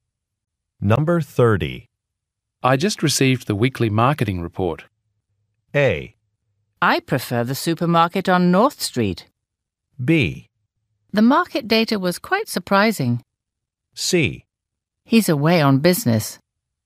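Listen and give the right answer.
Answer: B: The market data was quite surprising.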